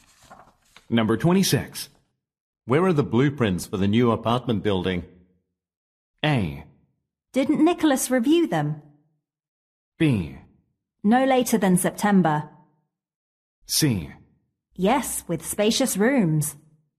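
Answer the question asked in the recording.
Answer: A: Didn't Nicholas review them?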